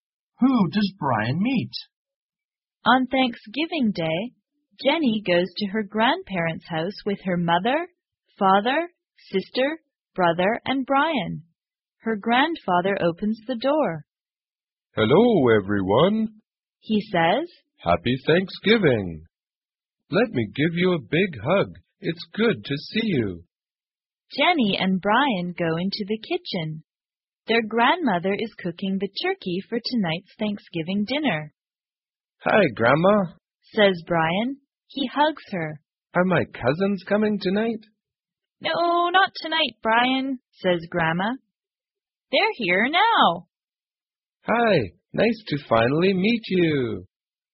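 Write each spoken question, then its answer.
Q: Who does Brian meet?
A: His cousins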